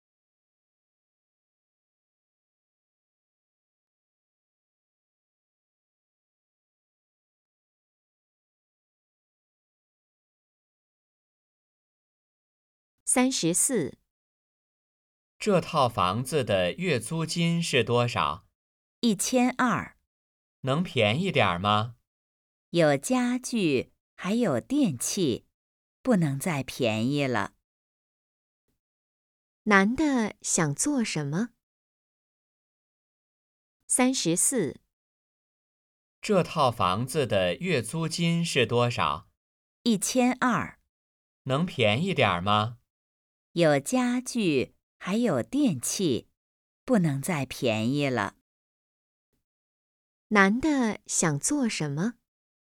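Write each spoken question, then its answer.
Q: 男的想做什么?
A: 租房子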